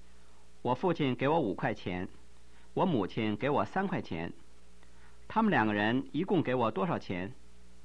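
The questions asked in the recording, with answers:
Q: 他们两个人一共给我多少钱?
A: 八块钱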